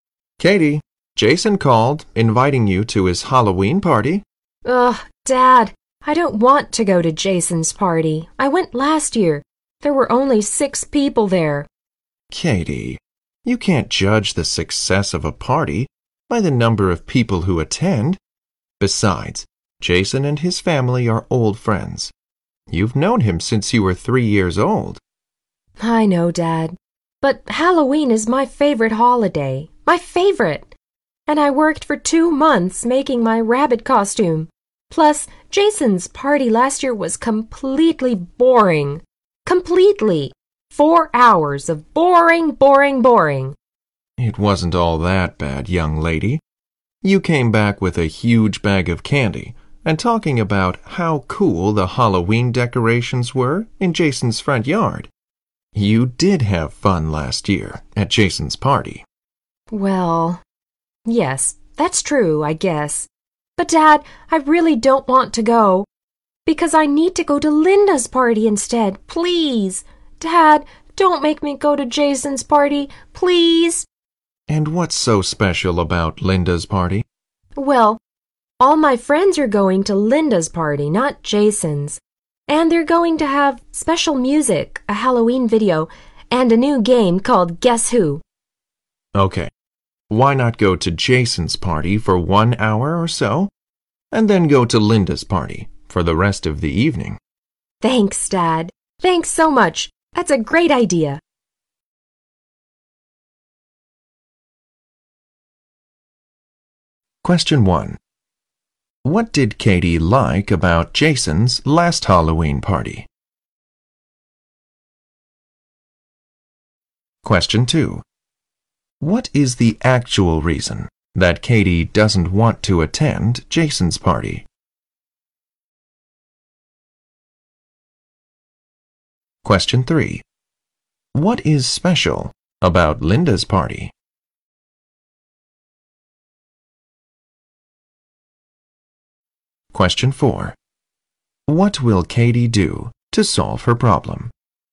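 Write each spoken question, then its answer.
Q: What did Katie like about Jason's last Halloween party?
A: The huge bag of candy and the cool Halloween decorations

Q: What is the actual reason that Katie doesn't want to attend Jason's party?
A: She wants to go to Linda's party, where all her friends are going

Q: What is special about Linda's party?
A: Special music, a Halloween video and a new game called Guess Who

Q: What will Katie do to solve her problem?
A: Go to Jason's party for about an hour, then go to Linda's party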